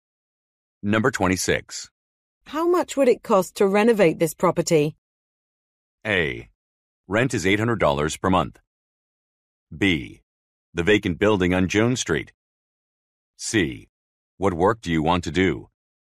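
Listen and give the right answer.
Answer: C: What work do you want to do?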